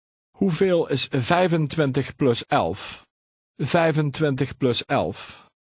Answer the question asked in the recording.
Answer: 36.